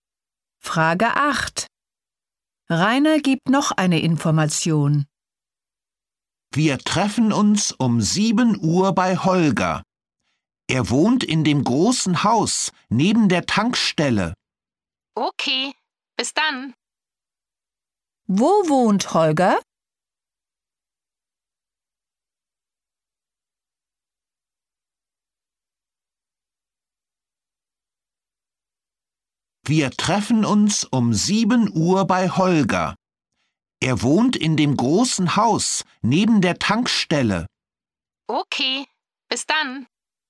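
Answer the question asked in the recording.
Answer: In dem großen Haus neben der Tankstelle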